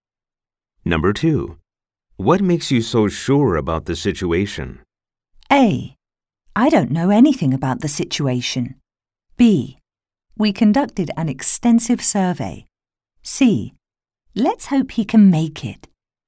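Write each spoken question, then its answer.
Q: What makes you so sure about the situation?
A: B: We conducted an extensive survey.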